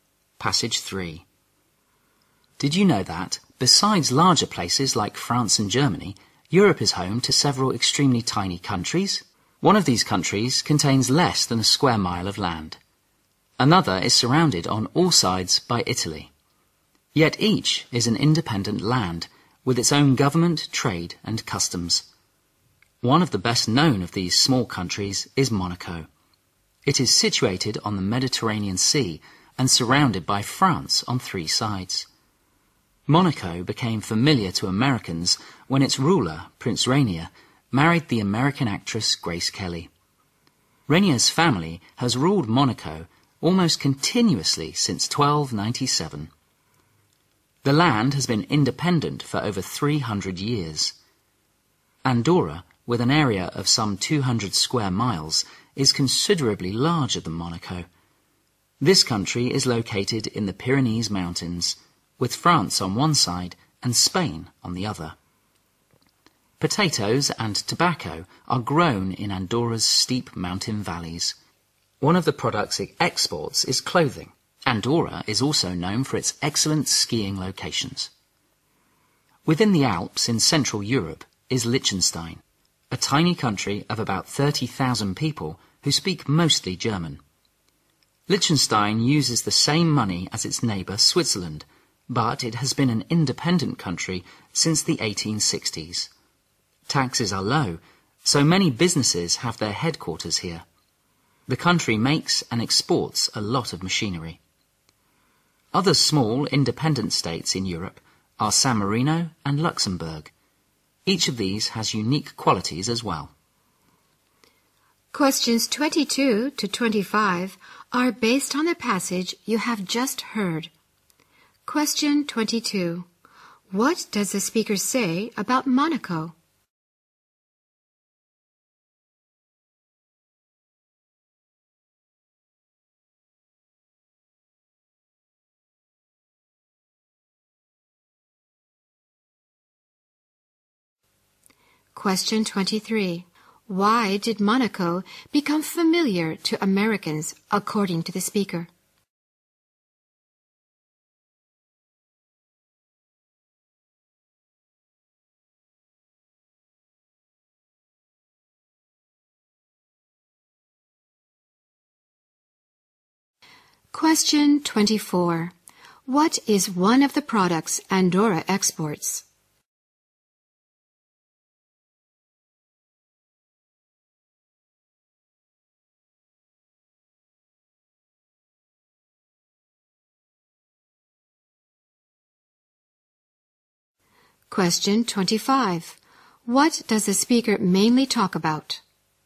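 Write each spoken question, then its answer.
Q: What does the speaker say about Monaco?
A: It is on the Mediterranean, surrounded by France on three sides, and ruled by Rainier's family since 1297

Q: Why did Monaco become familiar to Americans, according to the speaker?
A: Its ruler Prince Rainier married American actress Grace Kelly

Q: What is one of the products Andorra exports?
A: Clothing

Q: What does the speaker mainly talk about?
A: Some tiny independent countries in Europe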